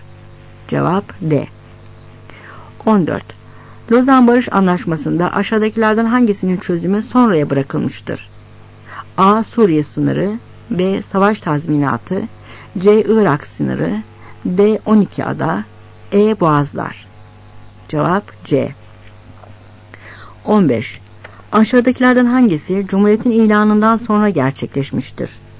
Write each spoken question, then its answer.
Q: Lozan Barış Anlaşması'nda aşağıdakilerden hangisinin çözümü sonraya bırakılmıştır?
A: Cevap C.